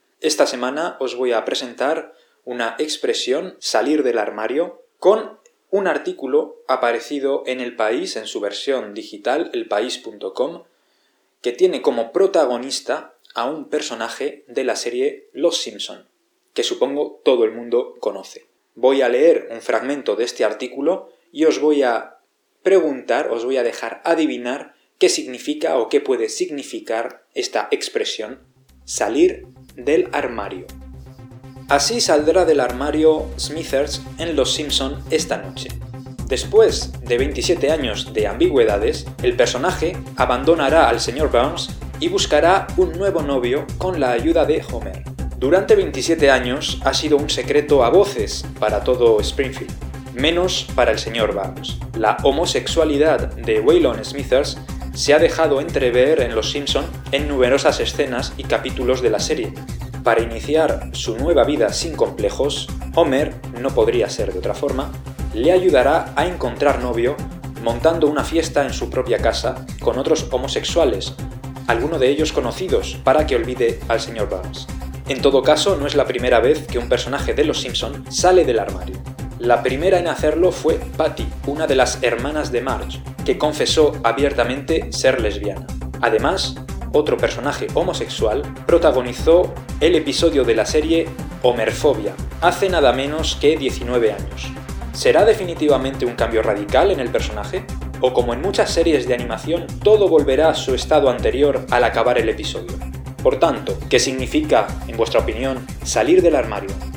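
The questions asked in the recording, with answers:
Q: Por tanto, ¿qué significa, en vuestra opinión, salir del armario?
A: Revelar abiertamente la propia homosexualidad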